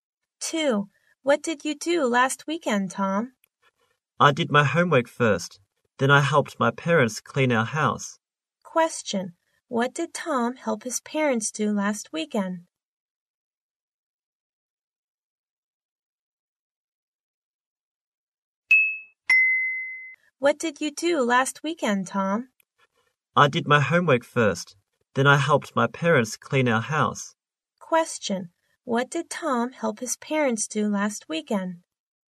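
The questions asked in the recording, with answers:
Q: What did Tom help his parents do last weekend?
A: Clean their house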